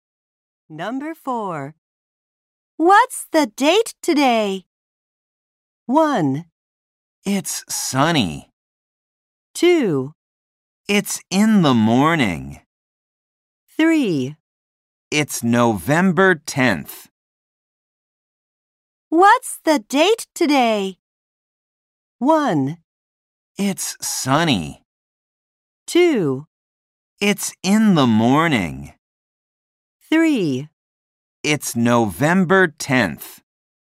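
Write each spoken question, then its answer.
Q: What's the date today?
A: 3: It's November 10th.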